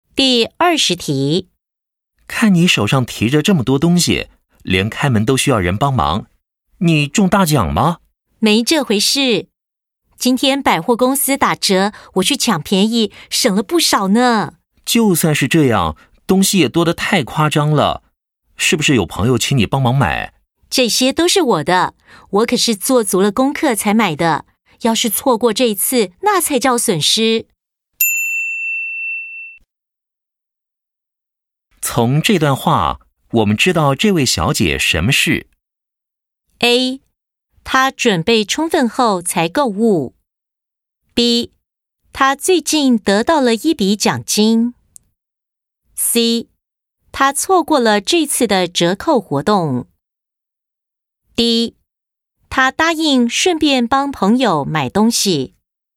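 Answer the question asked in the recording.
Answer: A: 她准备充分后才购物。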